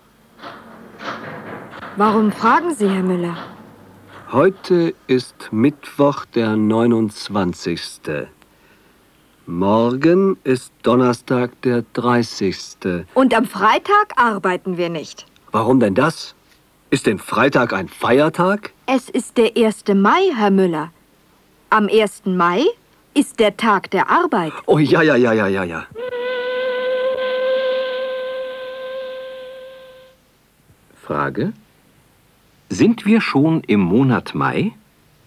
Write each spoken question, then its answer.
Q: Sind wir schon im Monat Mai?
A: Nein, wir sind noch nicht im Monat Mai.